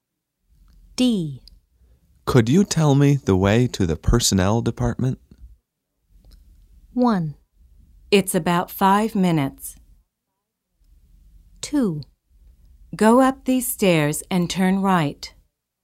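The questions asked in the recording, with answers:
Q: Could you tell me the way to the personnel department?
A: 2: Go up these stairs and turn right.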